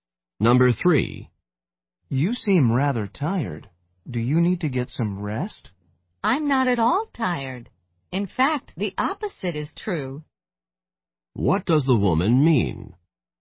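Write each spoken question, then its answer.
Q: What does the woman mean?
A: She is not tired; she is full of energy.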